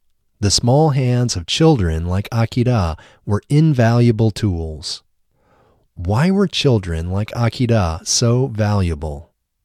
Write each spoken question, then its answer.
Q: Why were children like Akira so valuable?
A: Children like Akira were so valuable because of their small hands.